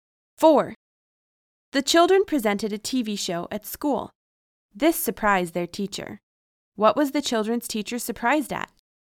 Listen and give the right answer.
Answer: She was surprised at the children's presenting a TV show at school.